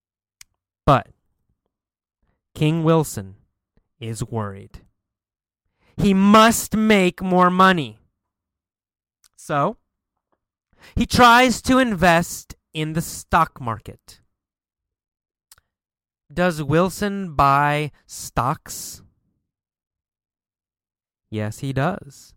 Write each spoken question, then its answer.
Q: Does Wilson buy stocks?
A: Yes, he does. Wilson buys stocks.